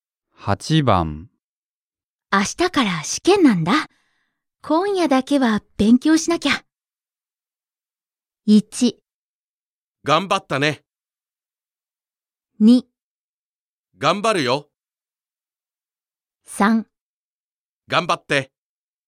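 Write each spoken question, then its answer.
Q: 明日から試験なんだ。今夜だけは勉強しなきゃ。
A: 3: 頑張って。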